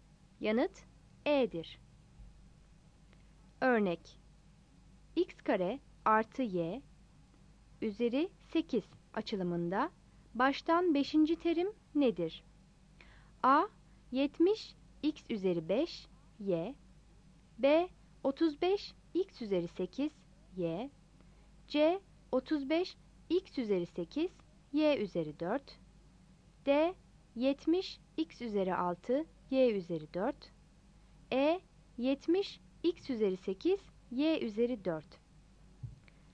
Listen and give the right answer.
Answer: Yanıt E'dir.